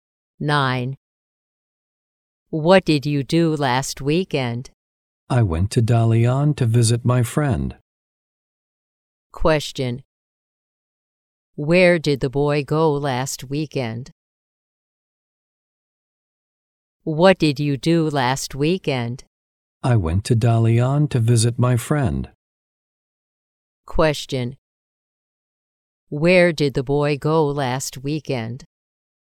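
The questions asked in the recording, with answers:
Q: Where did the boy go last weekend?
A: Dalian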